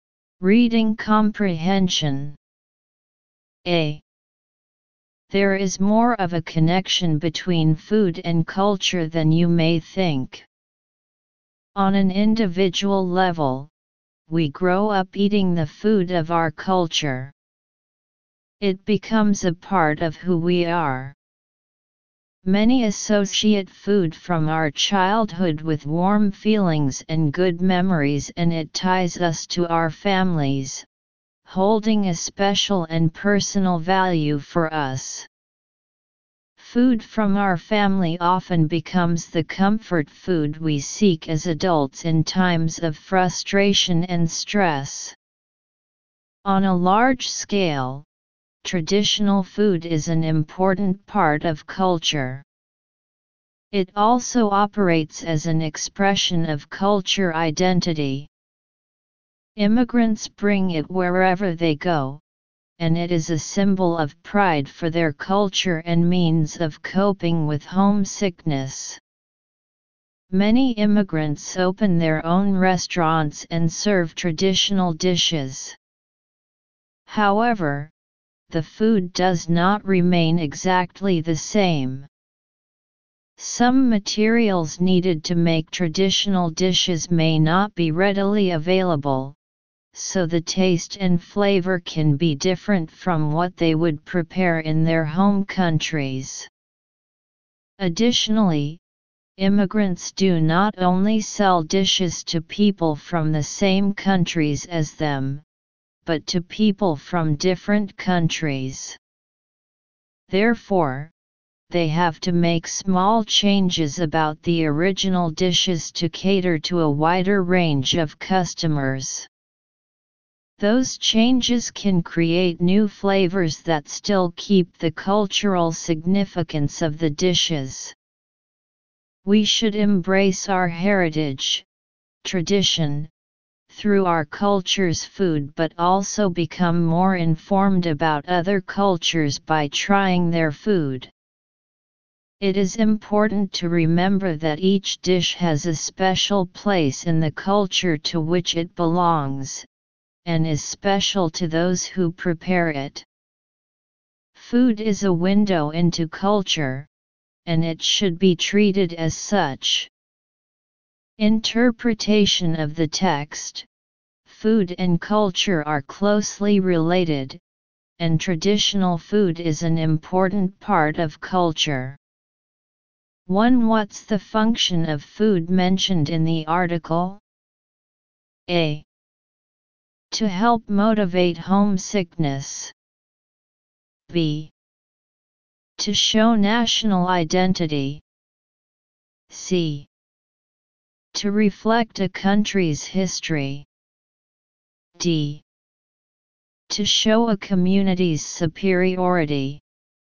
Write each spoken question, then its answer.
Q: What's the function of food mentioned in the article?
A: choose B